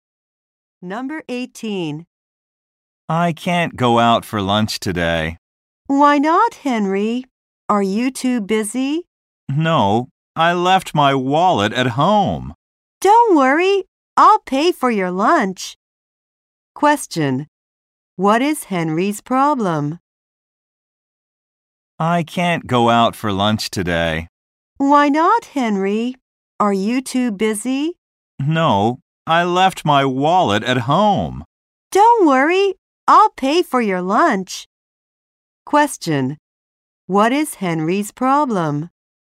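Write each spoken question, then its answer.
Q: What is Henry's problem?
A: He left his wallet at home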